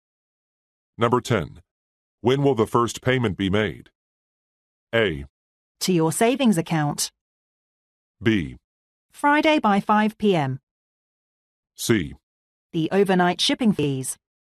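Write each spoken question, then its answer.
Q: When will the first payment be made?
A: B: Friday by 5 p.m.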